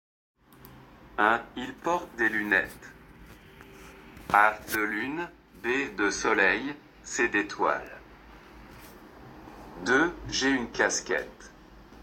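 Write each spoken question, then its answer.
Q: Il porte des lunettes.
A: B: De soleil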